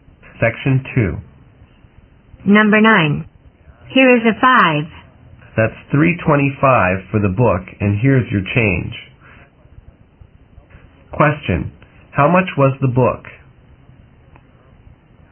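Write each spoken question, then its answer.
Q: How much was the book?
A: $3.25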